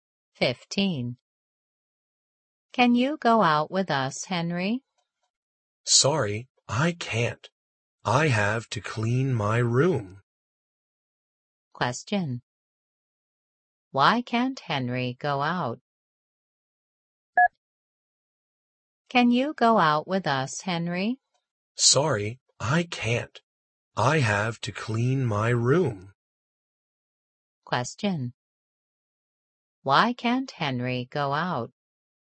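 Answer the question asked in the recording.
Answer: He has to clean his room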